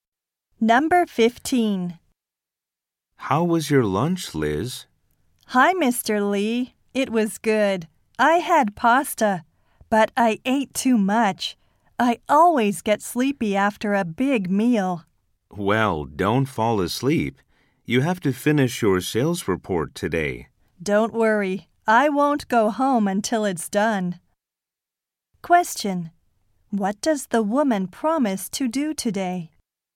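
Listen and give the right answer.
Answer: Finish her sales report.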